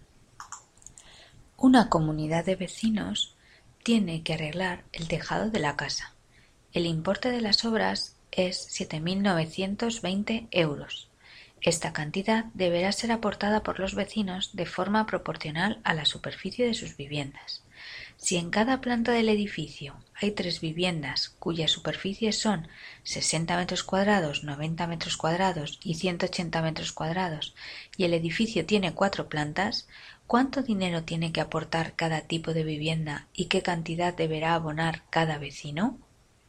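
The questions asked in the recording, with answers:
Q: ¿cuánto dinero tiene que aportar cada tipo de vivienda y qué cantidad deberá abonar cada vecino?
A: A 6 € por m2: cada vivienda de 60 m2 paga 360 € (1.440 € entre las cuatro), cada una de 90 m2 paga 540 € (2.160 € en total) y cada una de 180 m2 paga 1.080 € (4.320 € en total)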